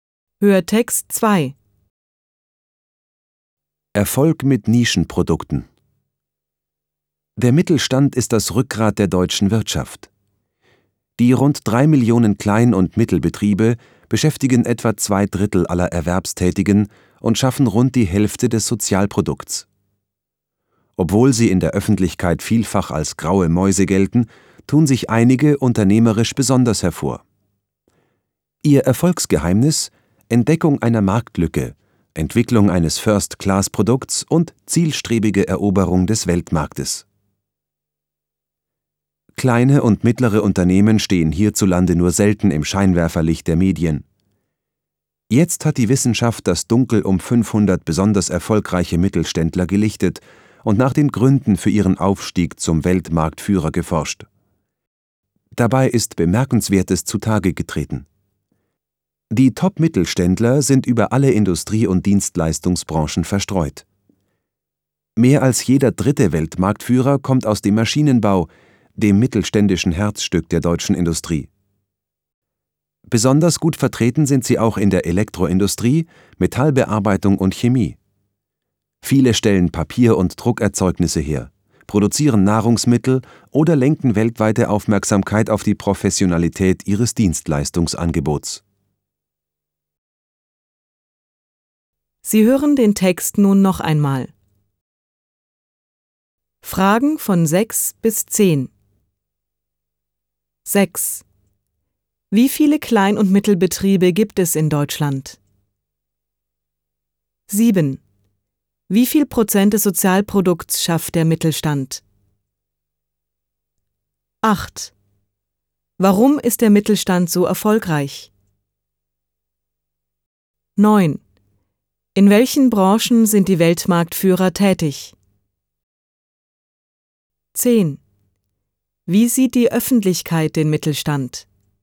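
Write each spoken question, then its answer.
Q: Wie viele Klein- und Mittelbetriebe gibt es in Deutschland?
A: Rund 3 Millionen

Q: Wie viel Prozent des Sozialprodukts schafft der Mittelstand?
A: Rund die Hälfte (50%)

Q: Warum ist der Mittelstand so erfolgreich?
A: Entdeckung einer Marktlücke, First-Class-Produkt, Eroberung des Weltmarktes

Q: In welchen Branchen sind die Weltmarktführer tätig?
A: In allen Branchen, besonders im Maschinenbau

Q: Wie sieht die Öffentlichkeit den Mittelstand?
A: Als graue Mäuse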